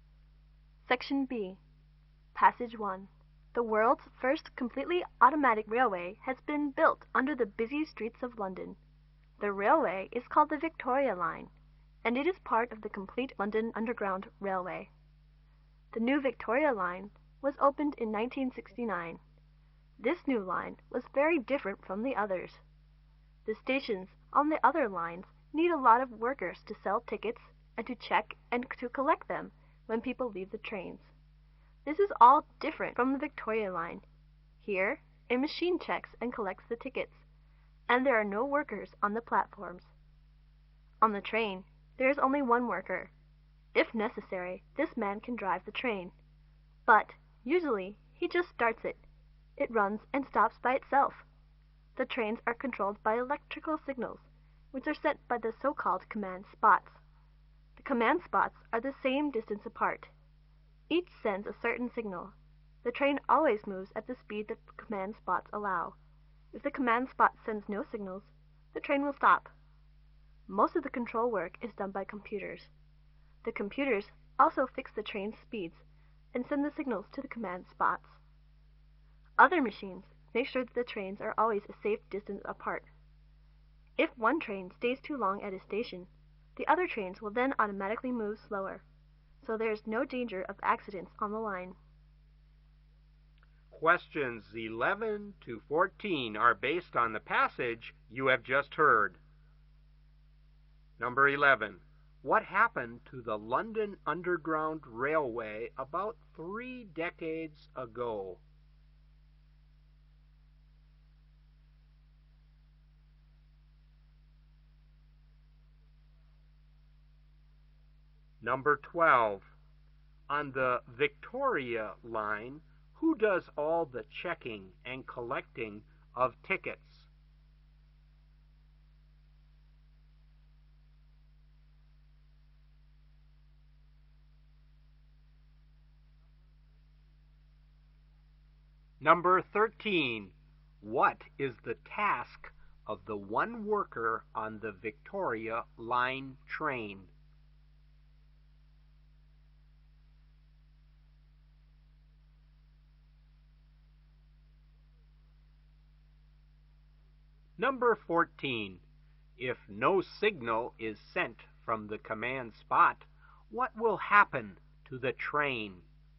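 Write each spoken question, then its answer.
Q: What happened to the London Underground Railway about 3 decades ago?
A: The automatic Victoria Line opened in 1969.

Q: On the Victoria Line, who does all the checking and collecting of tickets?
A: A machine

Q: What is the task of the one worker on the Victoria Line train?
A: He usually just starts the train, and drives it if necessary.

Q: If no signal is sent from the command spot, what will happen to the train?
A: It will stop.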